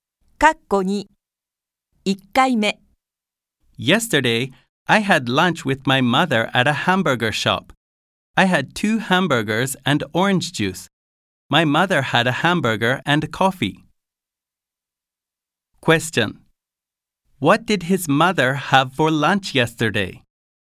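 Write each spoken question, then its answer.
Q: What did his mother have for lunch yesterday?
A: A hamburger and coffee.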